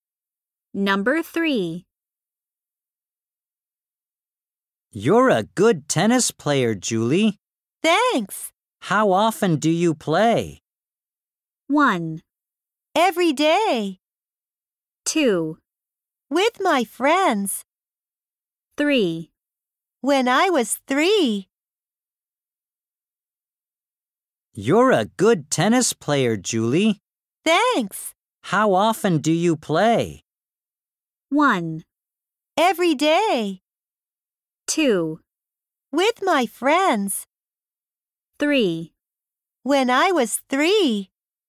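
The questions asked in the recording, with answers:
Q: How often do you play?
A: 1: Every day.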